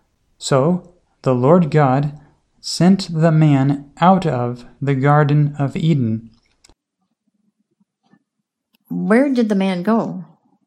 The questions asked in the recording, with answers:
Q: Where did the man go?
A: The man went out of the Garden of Eden.